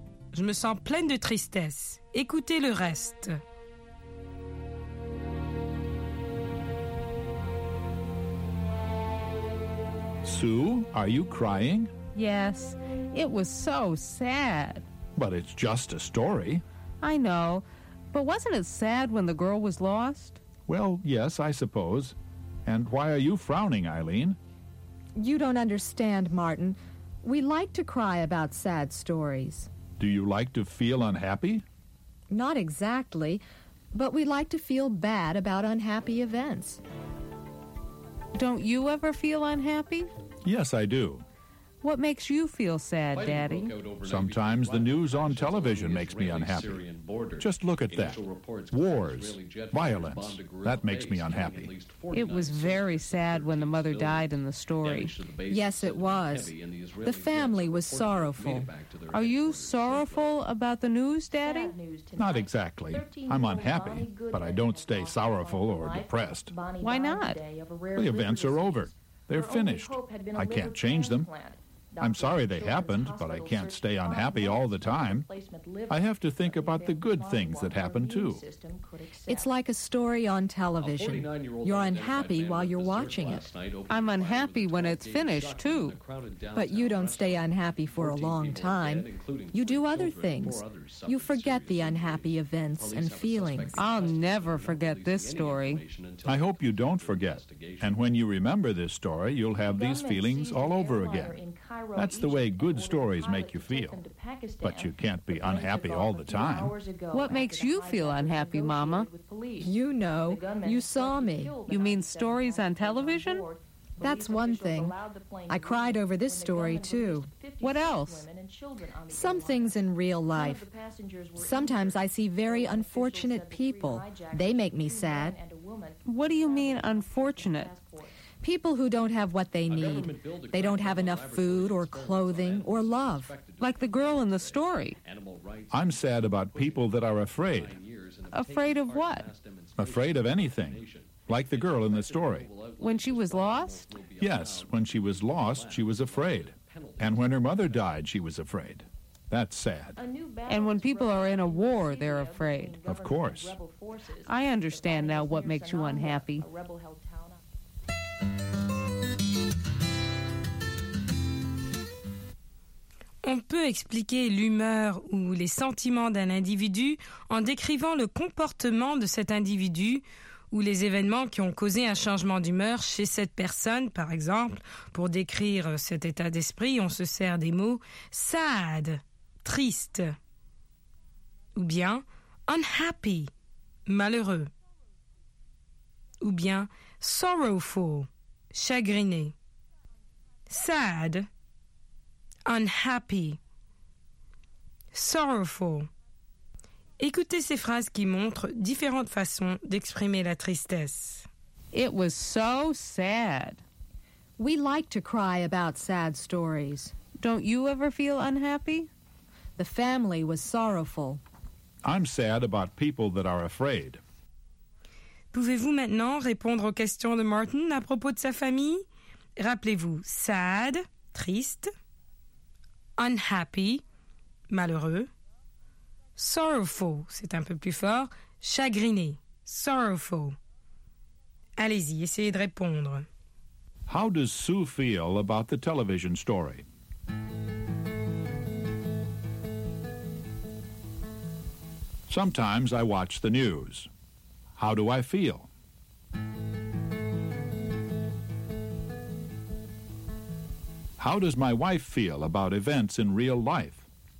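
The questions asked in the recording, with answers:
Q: How does Sue feel about the television story?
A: She feels sad; it made her cry.

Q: How do I feel?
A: Unhappy, but he doesn't stay sorrowful or depressed.

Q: How does my wife feel about events in real life?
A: Unfortunate people and people who are afraid make her sad.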